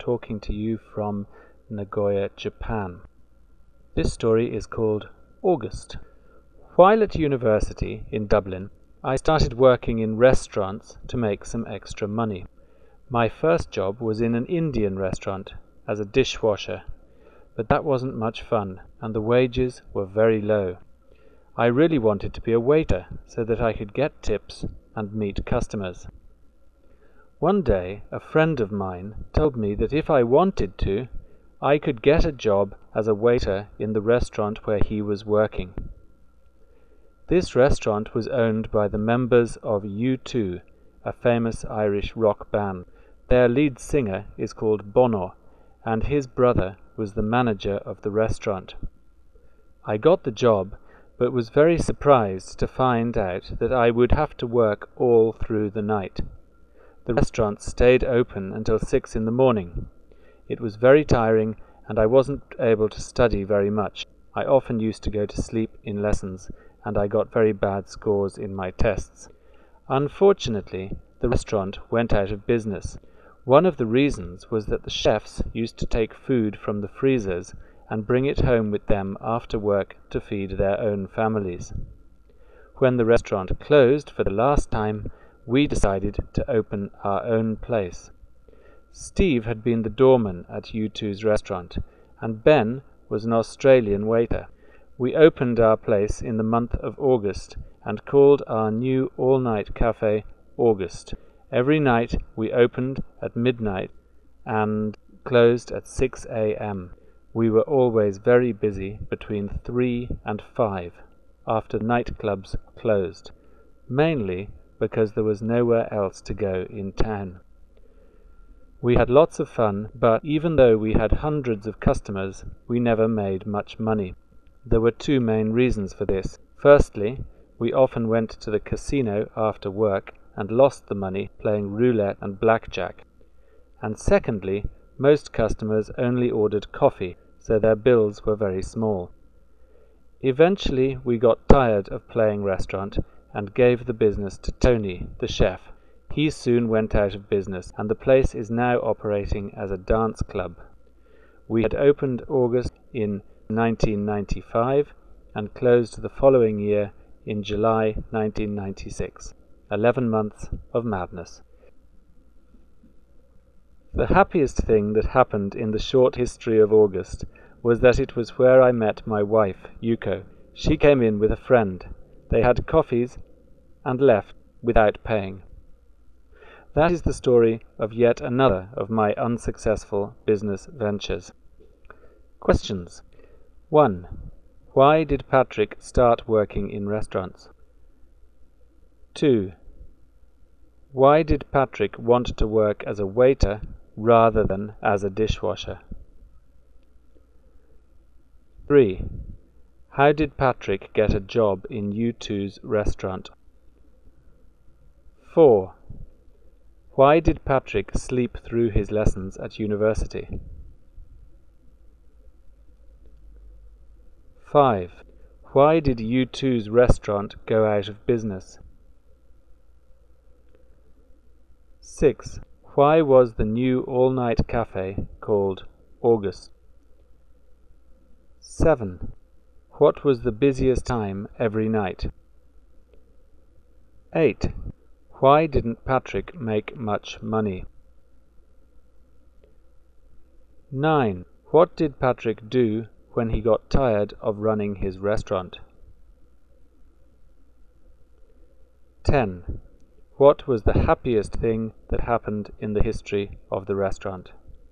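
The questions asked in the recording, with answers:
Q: Why did Patrick start working in restaurants?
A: To make some extra money while at university

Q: Why did Patrick want to work as a waiter rather than as a dishwasher?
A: To get tips and meet customers

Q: How did Patrick get a job in U2's restaurant?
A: A friend working there told him he could get a job

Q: Why did Patrick sleep through his lessons at university?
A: He worked all night at the restaurant

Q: Why did U2's restaurant go out of business?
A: The chefs took food home from the freezers

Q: Why was the new all-night cafe called August?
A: It opened in August

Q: What was the busiest time every night?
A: Between 3 and 5 a.m.

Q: Why didn't Patrick make much money?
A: They lost money at the casino and most customers only ordered coffee

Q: What did Patrick do when he got tired of running his restaurant?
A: Gave the business to Tony, the chef

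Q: What was the happiest thing that happened in the history of the restaurant?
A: He met his wife, Yuko, there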